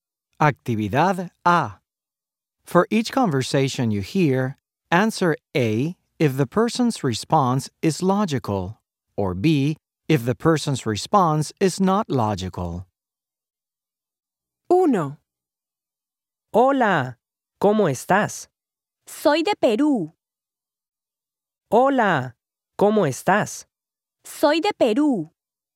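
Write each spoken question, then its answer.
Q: Hola, ¿cómo estás?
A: B: not logical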